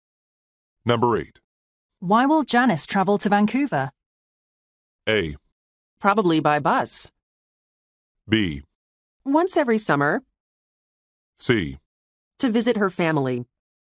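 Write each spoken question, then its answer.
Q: Why will Janice travel to Vancouver?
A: C: To visit her family.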